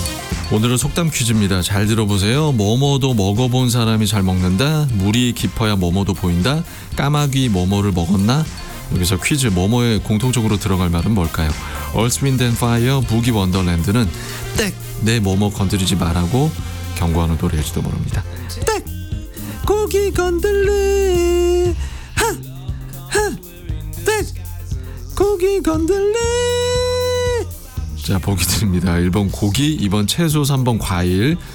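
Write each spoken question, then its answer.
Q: 여기서 퀴즈 뭐뭐에 공통적으로 들어갈 말은 뭘까요?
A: 1번: 고기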